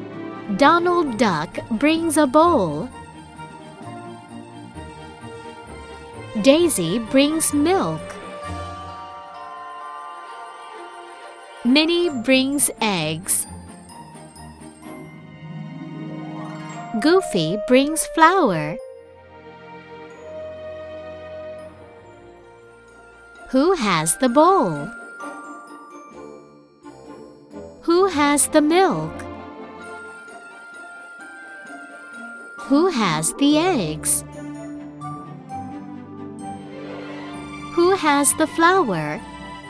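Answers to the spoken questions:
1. Donald Duck
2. Daisy
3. Minnie
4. Goofy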